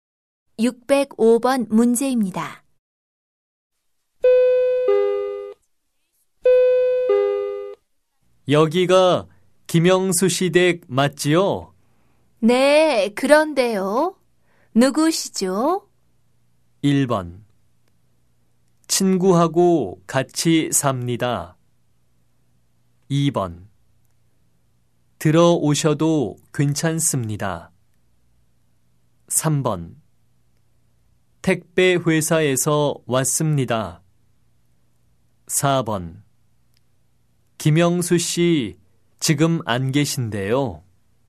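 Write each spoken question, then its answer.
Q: 여기가 김영수 씨 댁 맞지요? 네, 그런데요. 누구시죠?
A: 3: 택배 회사에서 왔습니다.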